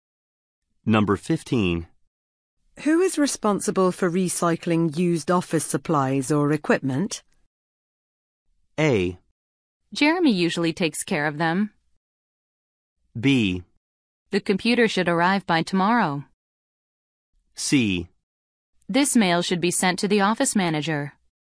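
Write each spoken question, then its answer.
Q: Who is responsible for recycling used office supplies or equipment?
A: A: Jeremy usually takes care of them.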